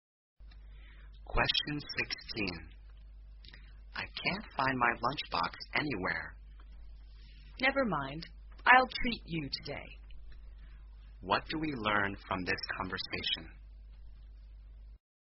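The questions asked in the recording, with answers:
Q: What do we learn from this conversation?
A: The speaker can't find the lunchbox, so the other will pay for lunch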